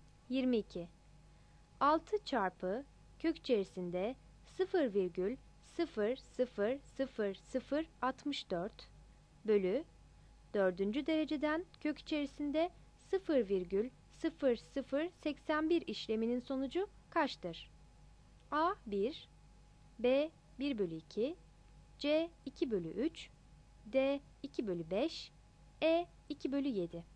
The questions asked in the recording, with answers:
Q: 0,0081 işleminin sonucu kaçtır?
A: 22 C